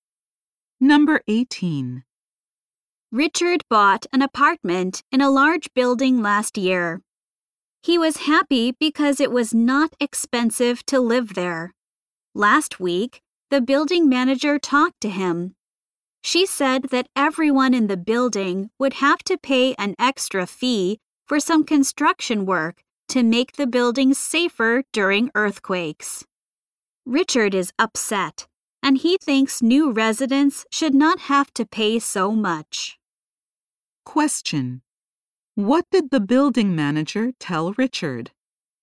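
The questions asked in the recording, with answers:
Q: What did the building manager tell Richard?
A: Everyone must pay an extra fee for construction to make the building safer during earthquakes.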